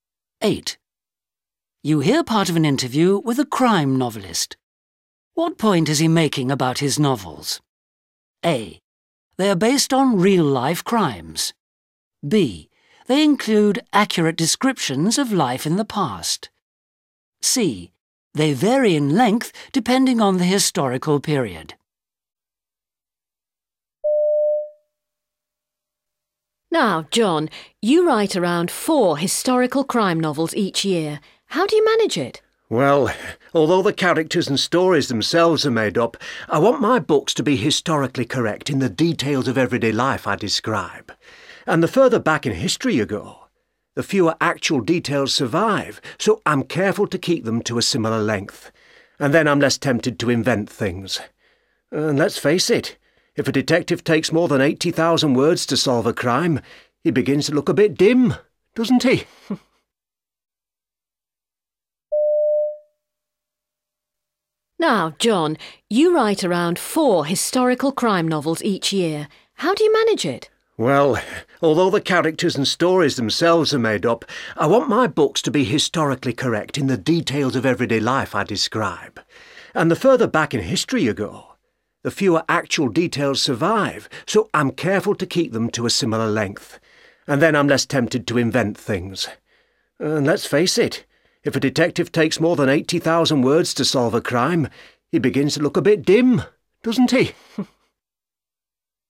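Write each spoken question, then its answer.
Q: What point is he making about his novels?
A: B: They include accurate descriptions of life in the past.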